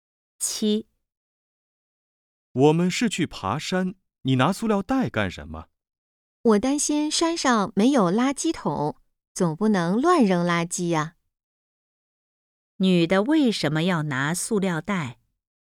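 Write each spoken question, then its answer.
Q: 女的为什么要拿塑料袋?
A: 担心山上没有垃圾桶,不能乱扔垃圾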